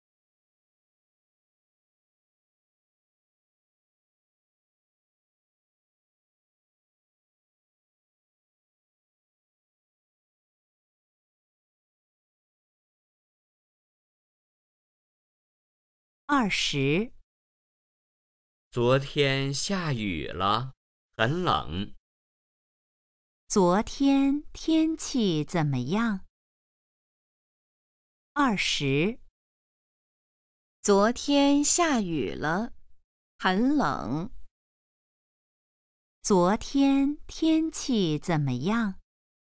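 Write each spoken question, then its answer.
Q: 昨天天气怎么样?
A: 下雨了,很冷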